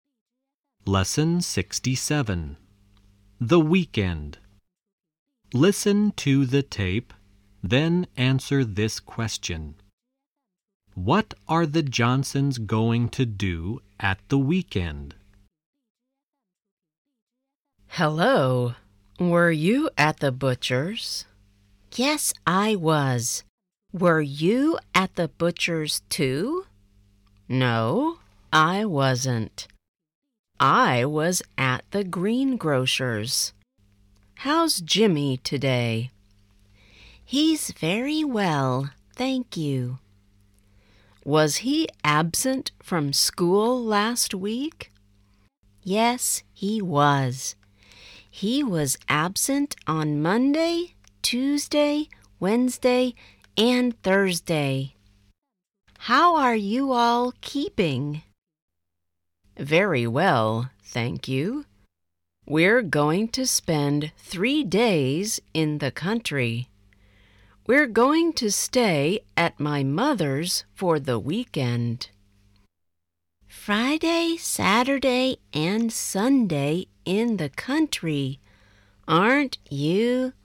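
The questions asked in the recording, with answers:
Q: What are the Johnsons going to do at the weekend?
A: Spend three days in the country at Mrs. Johnson's mother's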